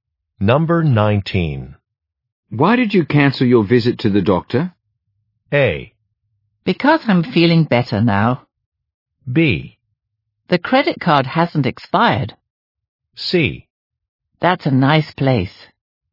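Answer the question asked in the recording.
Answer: A: Because I'm feeling better now.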